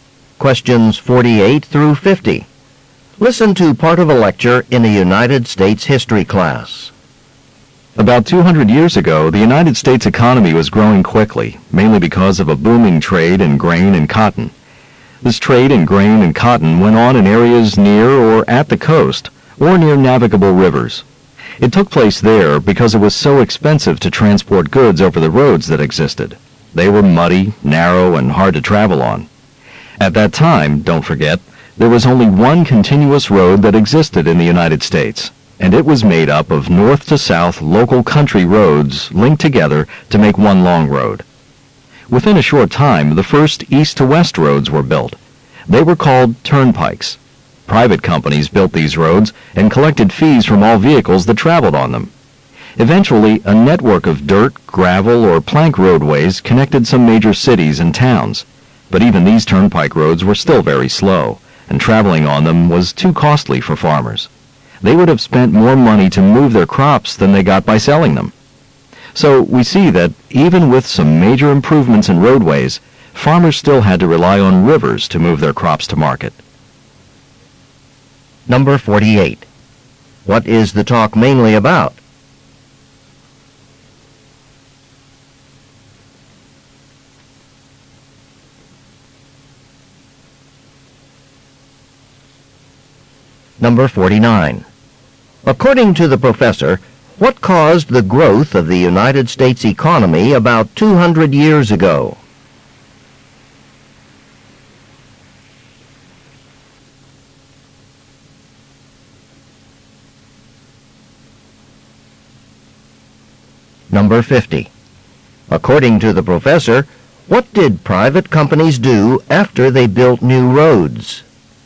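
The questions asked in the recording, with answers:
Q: What is the talk mainly about?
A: Early US roads and transporting crops

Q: According to the professor, what caused the growth of the United States economy about 200 years ago?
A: Trade in grain and cotton

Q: According to the professor, what did private companies do after they built new roads?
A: Collected fees from vehicles using them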